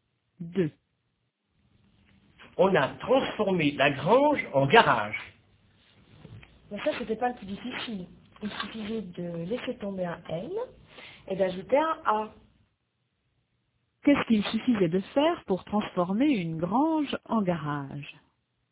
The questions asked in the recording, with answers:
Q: Qu'est-ce qu'il suffisait de faire pour transformer une grange en garage?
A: Il suffisait de laisser tomber un N et d'ajouter un A.